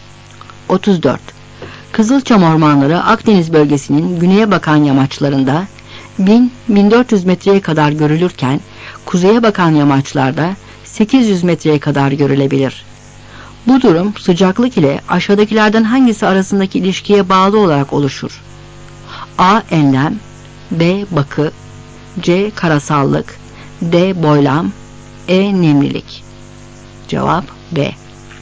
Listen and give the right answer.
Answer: Cevap B.